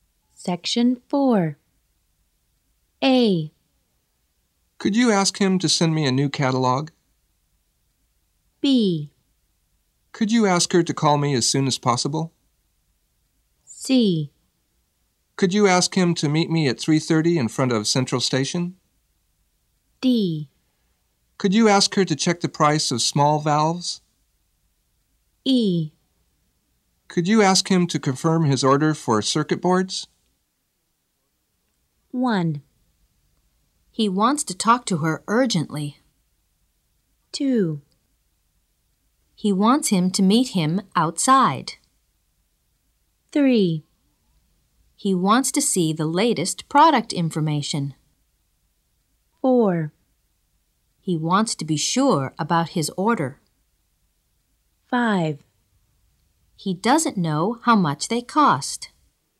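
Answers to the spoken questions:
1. B: Could you ask her to call me as soon as possible?
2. C: Could you ask him to meet me at 3:30 in front of Central Station?
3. A: Could you ask him to send me a new catalog?
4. E: Could you ask him to confirm his order for circuit boards?
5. D: Could you ask her to check the price of small valves?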